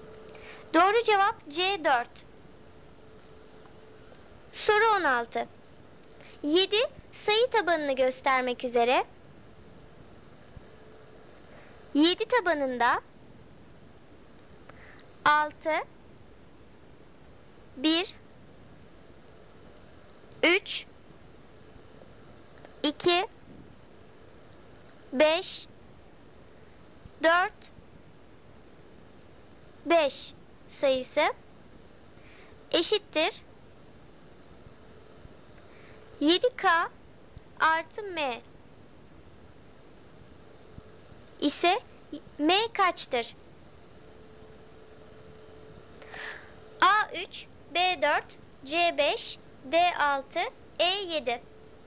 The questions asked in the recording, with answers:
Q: ise M kaçtır?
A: Doğru cevap C 5.